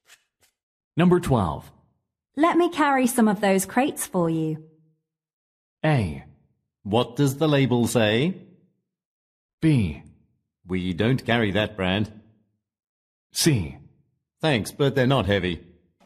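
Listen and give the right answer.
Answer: C: Thanks, but they're not heavy.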